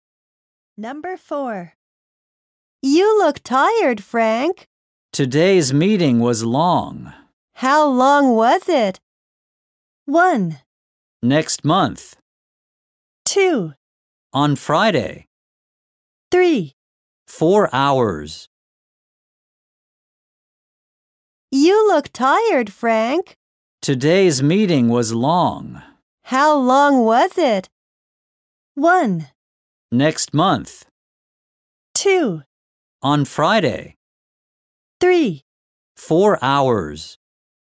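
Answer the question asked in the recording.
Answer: 3: 4 hours.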